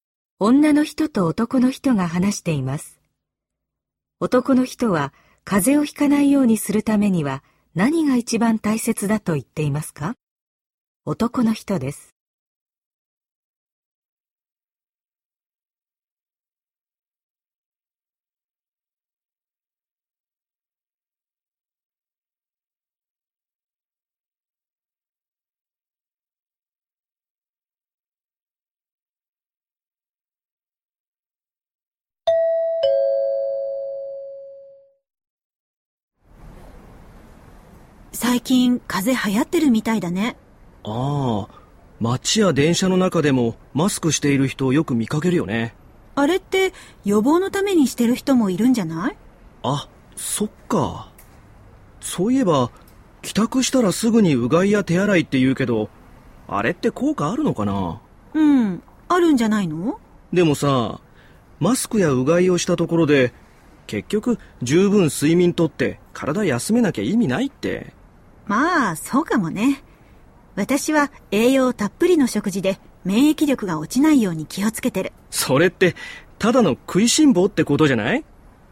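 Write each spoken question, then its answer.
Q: 男の人は風邪をひかないようにするためには何が一番大切だと言っていますか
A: 十分睡眠をとって体を休めること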